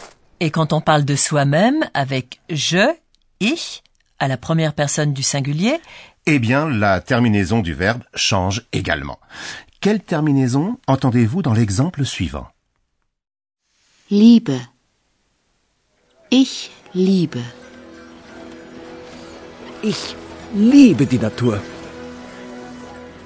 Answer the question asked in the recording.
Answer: À la première personne du singulier, on utilise la terminaison E.